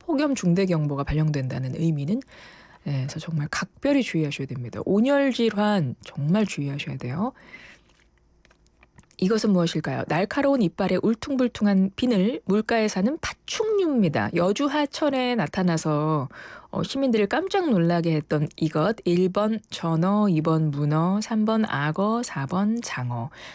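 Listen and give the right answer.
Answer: 3번: 악어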